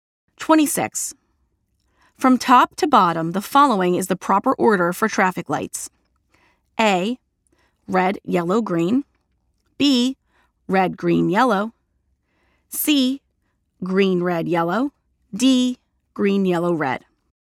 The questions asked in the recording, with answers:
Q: From top to bottom, the following is the proper order for traffic lights.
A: The answer is letter A, red, yellow, green.